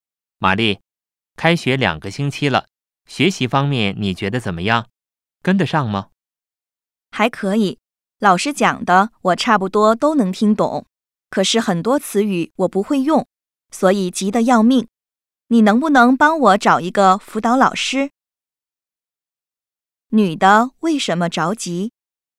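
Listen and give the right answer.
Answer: 很多词语她不会用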